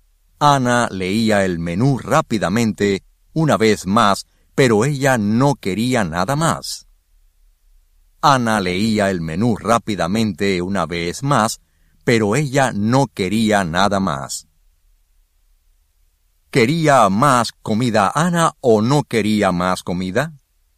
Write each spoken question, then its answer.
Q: ¿Quería más comida Ana o no quería más comida?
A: En ese momento, ella no quería más comida.